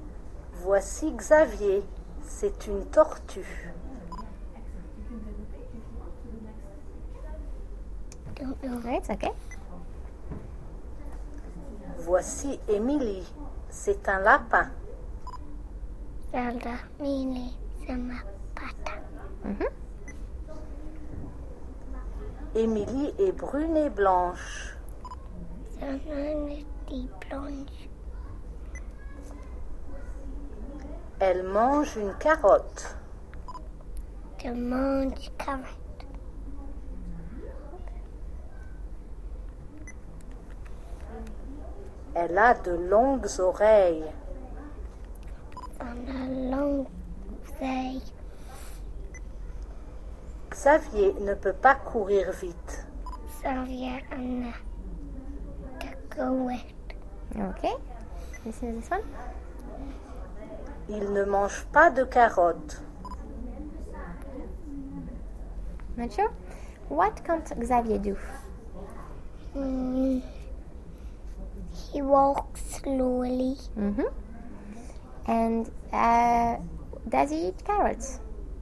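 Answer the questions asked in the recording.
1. Run fast
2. No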